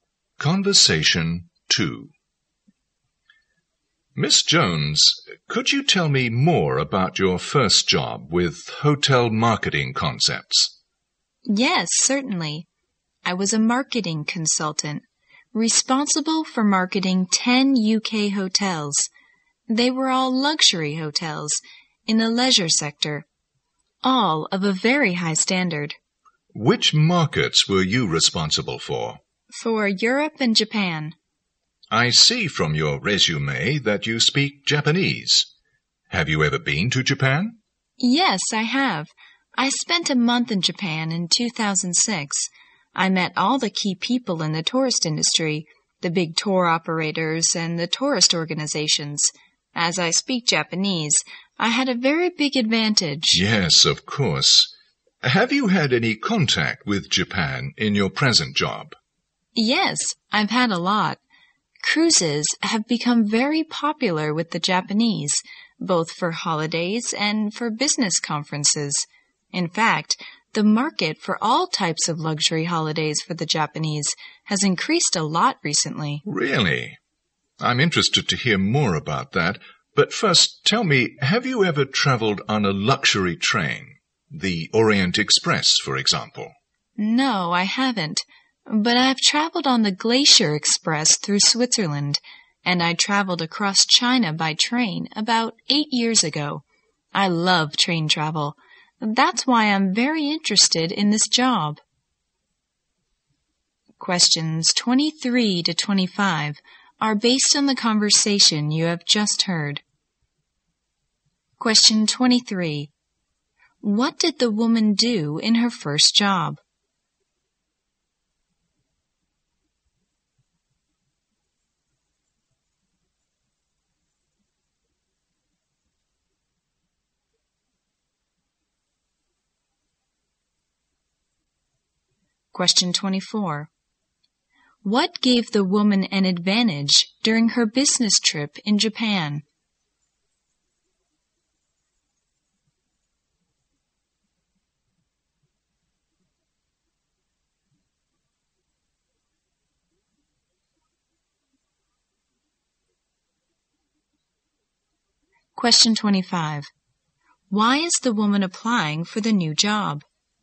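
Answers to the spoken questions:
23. She was a marketing consultant for 10 UK hotels
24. She speaks Japanese
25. She loves train travel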